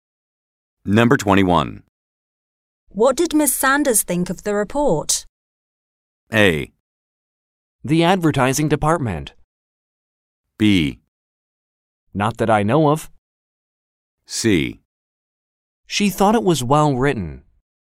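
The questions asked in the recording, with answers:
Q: What did Miss Sanders think of the report?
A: C: She thought it was well written.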